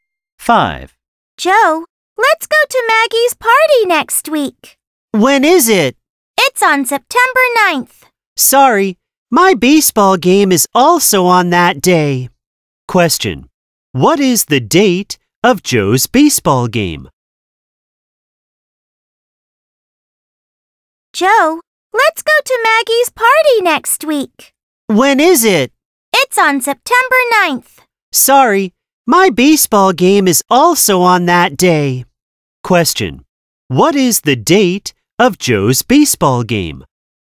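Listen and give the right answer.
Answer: September 9th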